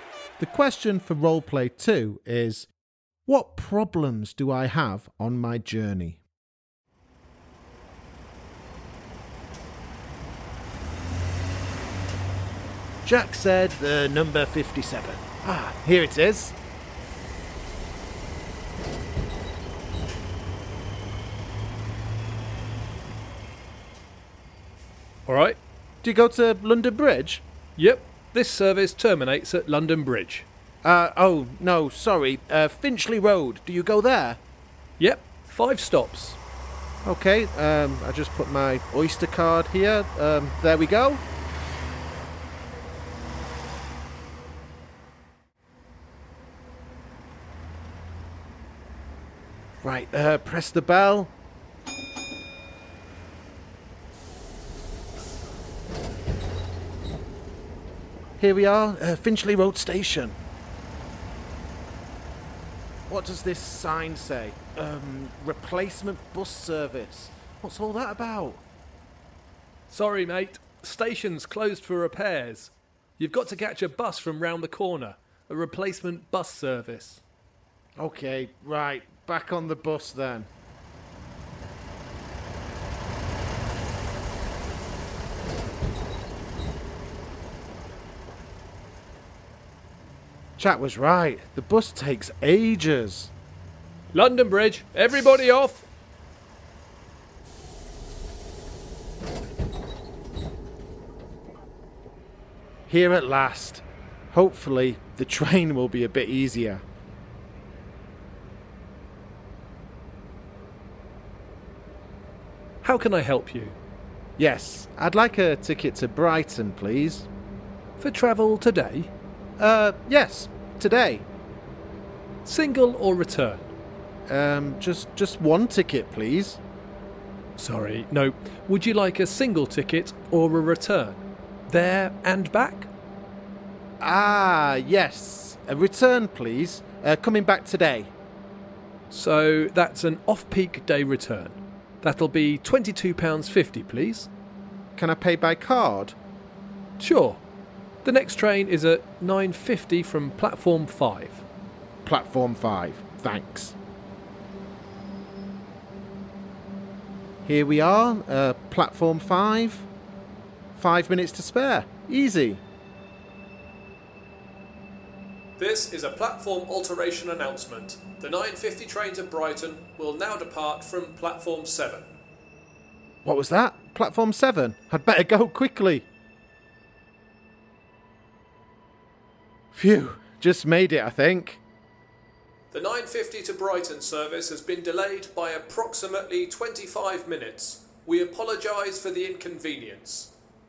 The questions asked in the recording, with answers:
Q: what problems do I have on my journey?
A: Well, I had to take a bus when I wanted to take the train.